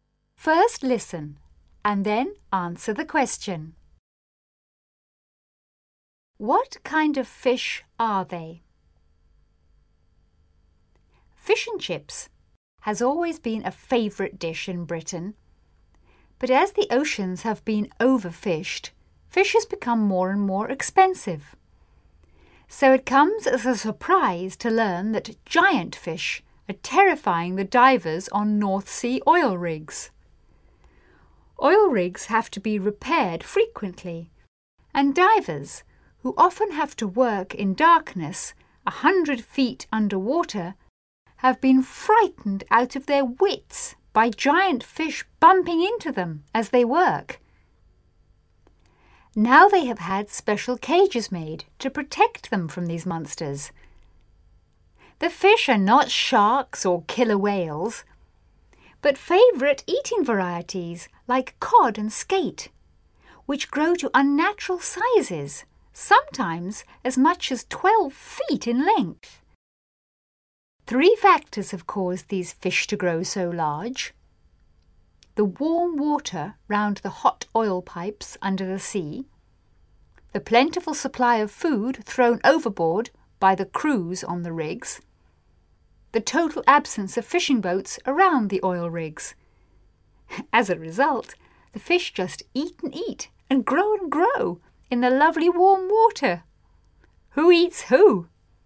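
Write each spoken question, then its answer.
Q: What kind of fish are they?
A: Favourite eating varieties like cod and skate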